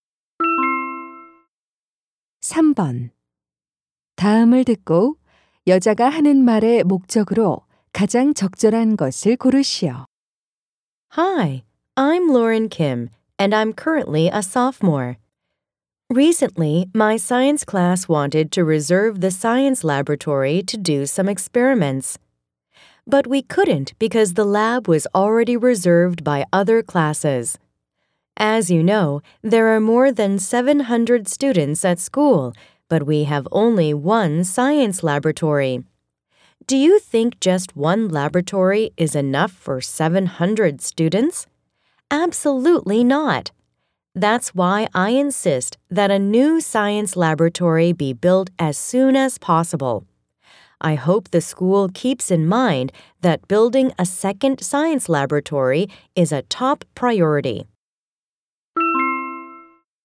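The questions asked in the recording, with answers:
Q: 다음을 듣고 여자가 하는 말의 목적으로 가장 적절한 것을 고르시오.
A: 새 과학 실험실 건설을 요구하려고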